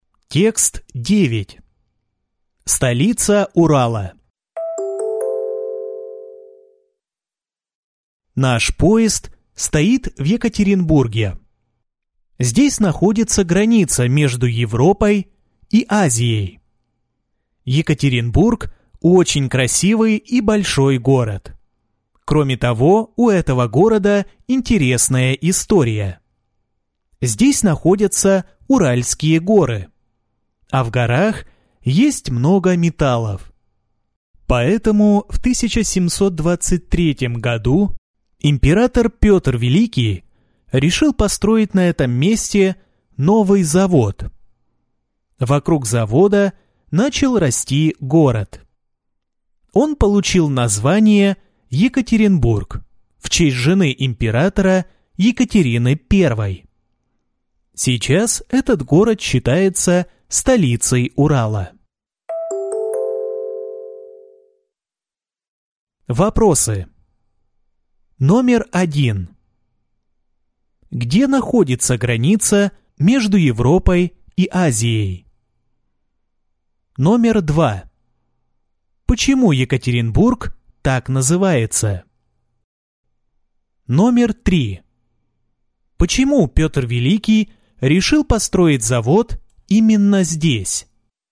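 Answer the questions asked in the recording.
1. В Екатеринбурге
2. В честь жены императора Екатерины I
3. Потому что в Уральских горах много металлов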